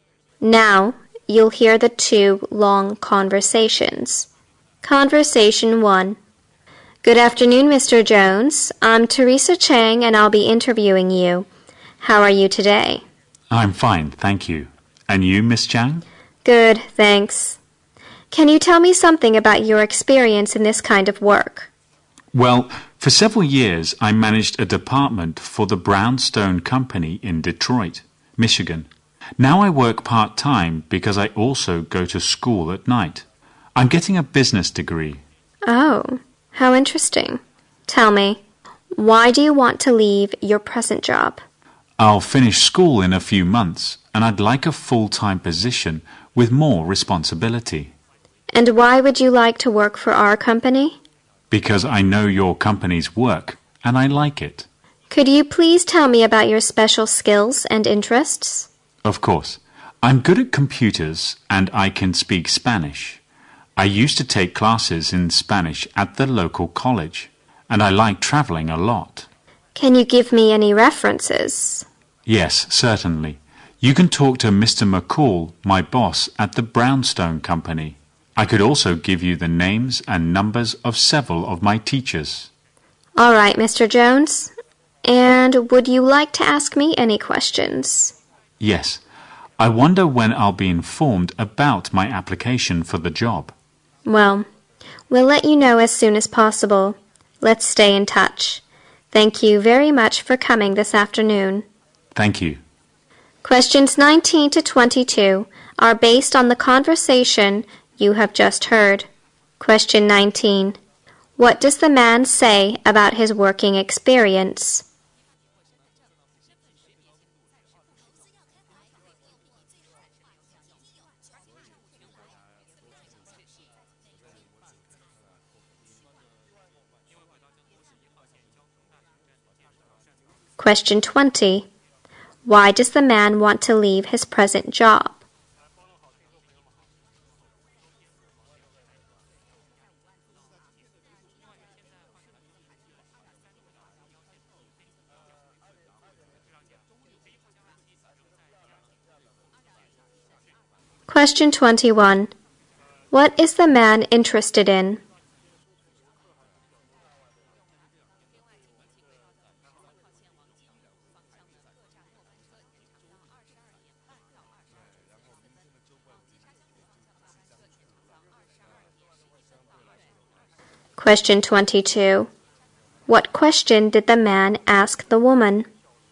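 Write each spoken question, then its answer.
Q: What does the man say about his working experience?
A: He managed a department at the Brownstone Company in Detroit for several years.

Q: Why does the man want to leave his present job?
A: He wants a full-time job with more responsibility.

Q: What is the man interested in?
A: Computers, Spanish and traveling

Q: What question did the man ask the woman?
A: When he would hear about his job application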